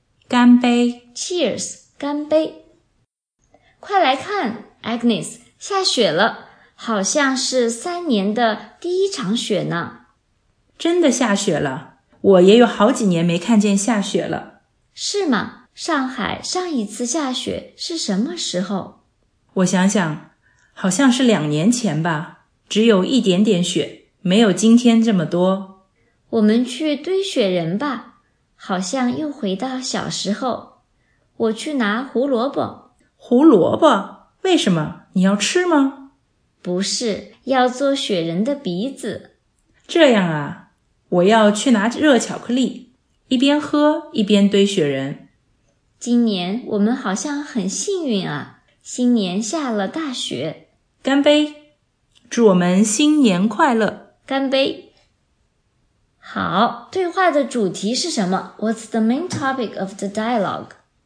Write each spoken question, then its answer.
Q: 好对话的主题是什么 What's the main topic of the dialogue?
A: 下雪和堆雪人 Snow and snowman